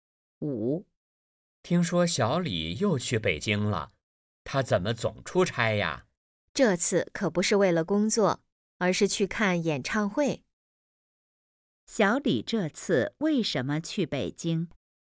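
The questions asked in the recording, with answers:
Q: 小李这次为什么去北京?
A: 去看演唱会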